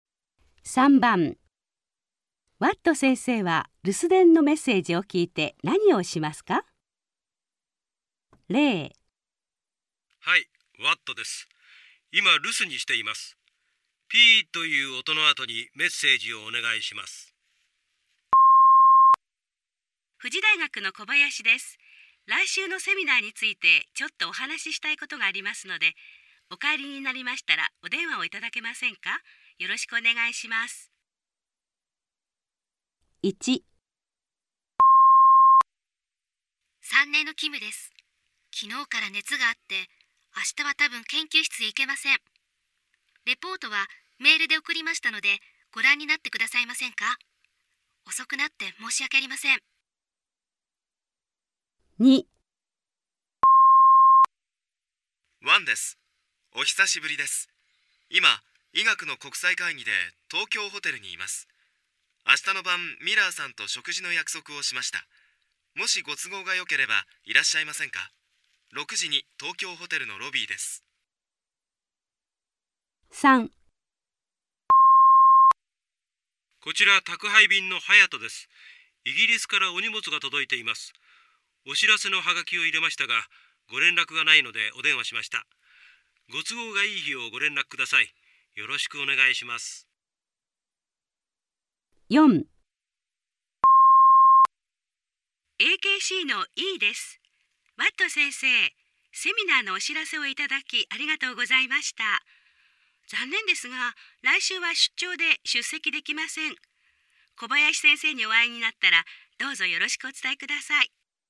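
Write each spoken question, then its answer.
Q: ワット先生は留守電のメッセージを聞いて何をしますか?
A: メールで送られたキムさんのレポートを読む

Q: ワット先生は留守電のメッセージを聞いて何をしますか?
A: 都合のいい日を宅配便に連絡する

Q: ワット先生は留守電のメッセージを聞いて何をしますか?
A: 小林先生に会ったら、Eさんからよろしくと伝える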